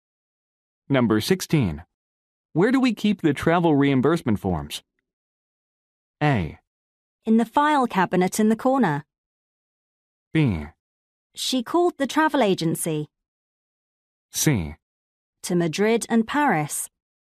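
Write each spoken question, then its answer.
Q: Where do we keep the travel reimbursement forms?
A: A: In the file cabinet in the corner.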